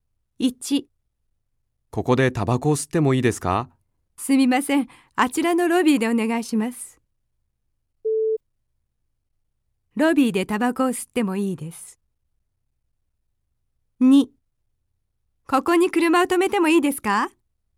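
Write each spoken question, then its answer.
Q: ロビーでタバコを吸ってもいいです。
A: 正しい(○)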